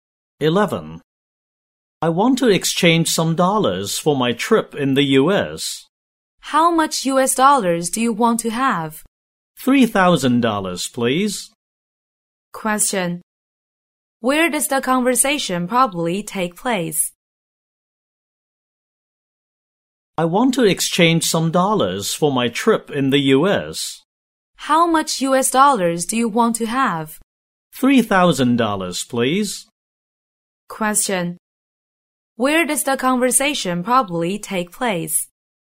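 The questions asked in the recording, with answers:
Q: Where does the conversation probably take place?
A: In a bank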